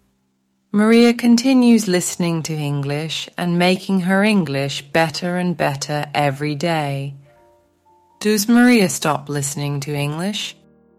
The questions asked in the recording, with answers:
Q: Does Maria stop listening to English?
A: No, she doesn't. She continues listening to English.